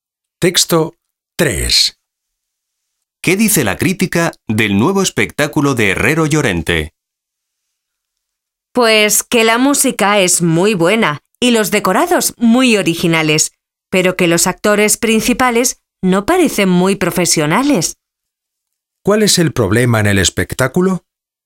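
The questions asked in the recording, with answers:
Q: ¿Cuál es el problema en el espectáculo?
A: Los actores principales no parecen muy profesionales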